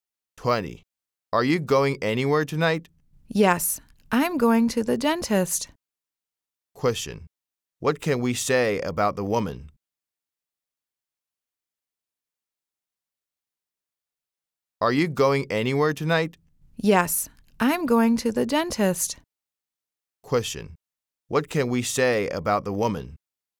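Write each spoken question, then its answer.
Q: Question: What can we say about the woman?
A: She is going to the dentist tonight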